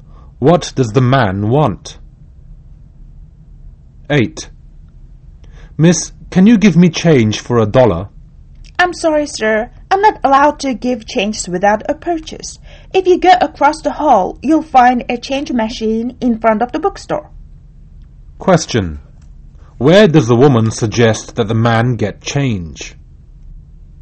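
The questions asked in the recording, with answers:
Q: Where does the woman suggest that the man get change?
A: At the change machine in front of the bookstore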